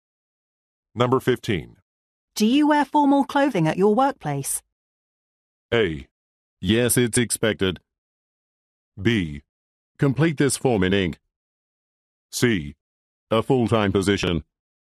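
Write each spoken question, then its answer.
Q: Do you wear formal clothing at your workplace?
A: A: Yes, it's expected.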